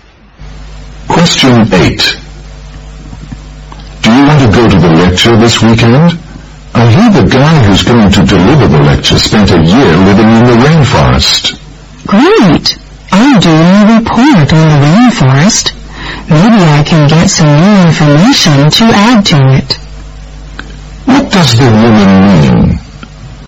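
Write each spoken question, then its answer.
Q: What does the woman mean?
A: She wants to go because the lecture may give her new information for her rainforest report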